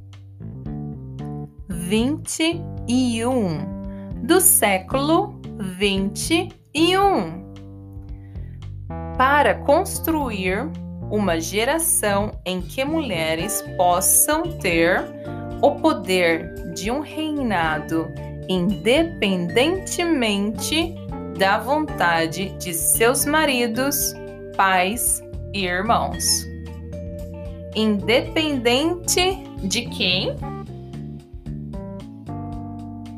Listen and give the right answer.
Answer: independente dos seus maridos, pais e irmãos.